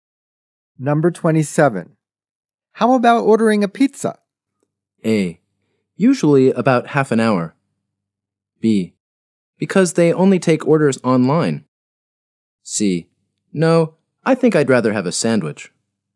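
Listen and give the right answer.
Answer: C: No, I think I'd rather have a sandwich.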